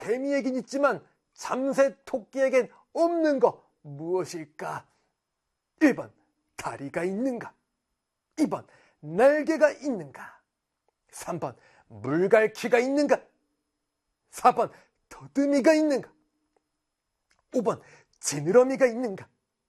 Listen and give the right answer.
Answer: 정답은 문다 4번